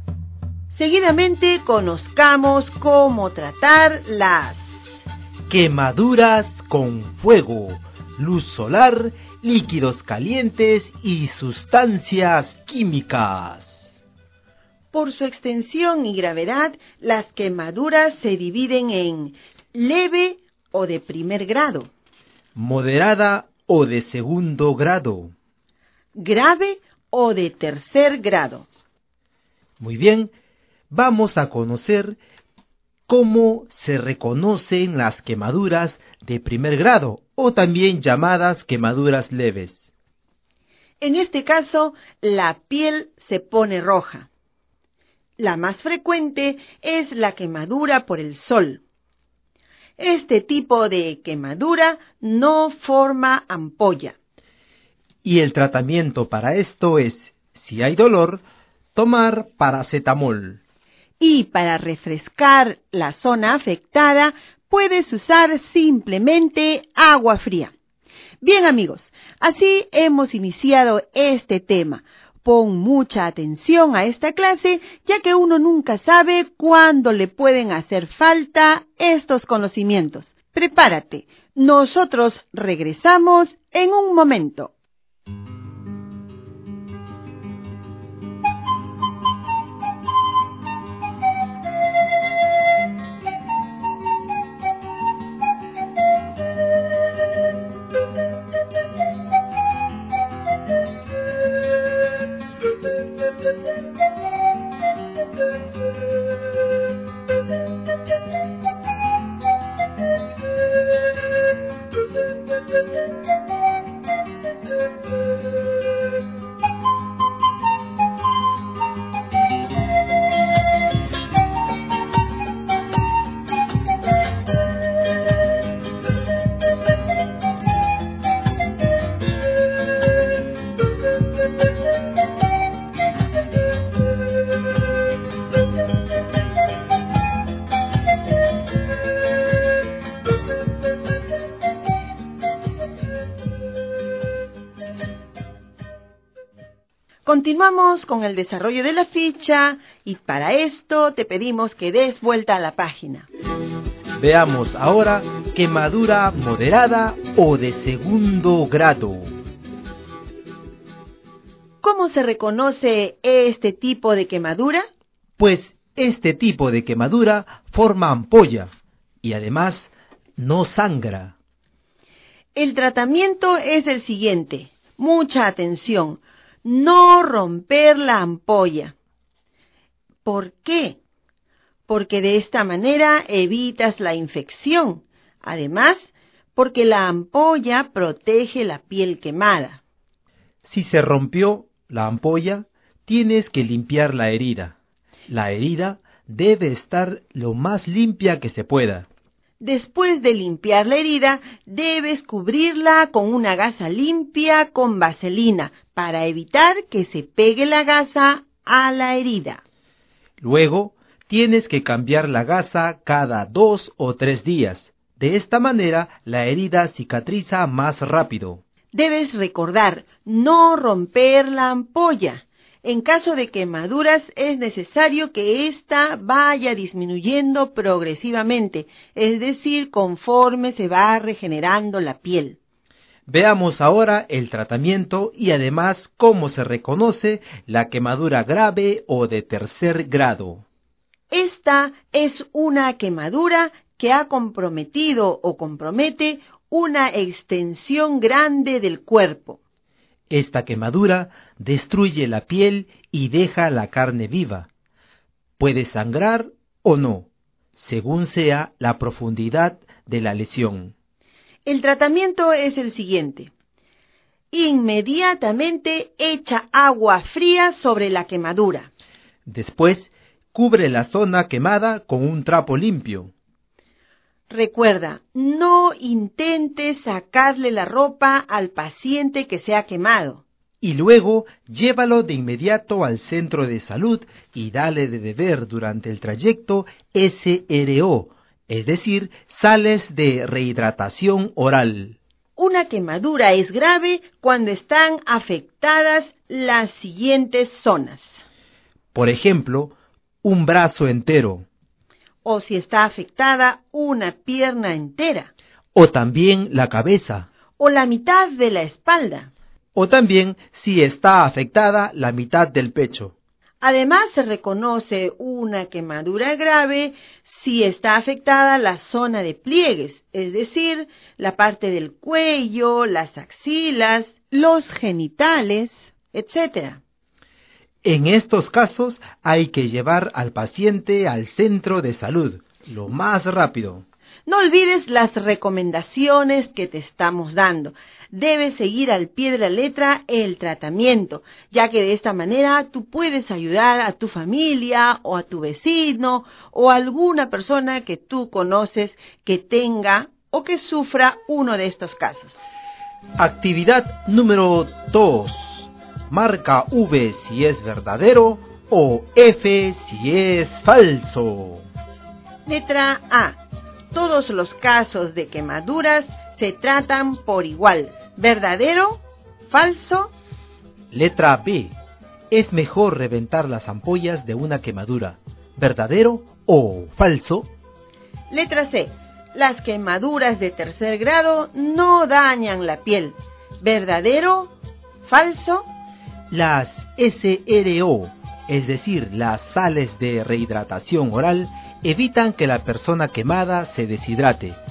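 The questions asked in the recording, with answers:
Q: Letra A. Todos los casos de quemaduras se tratan por igual. ¿Verdadero? ¿Falso?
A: Falso

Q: Letra B. Es mejor reventar las ampollas de una quemadura. ¿Verdadero o falso?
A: Falso

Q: Letra C. Las quemaduras de tercer grado no dañan la piel. ¿Verdadero? ¿Falso?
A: Falso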